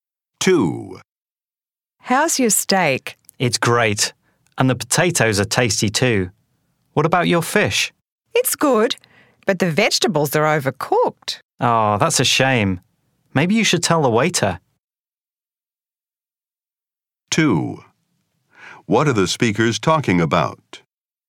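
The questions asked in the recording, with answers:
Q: What are the speakers talking about?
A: Their meal at a restaurant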